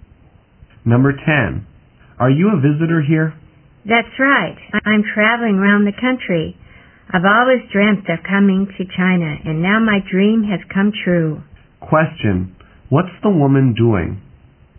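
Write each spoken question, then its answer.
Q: What's the woman doing?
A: Traveling around China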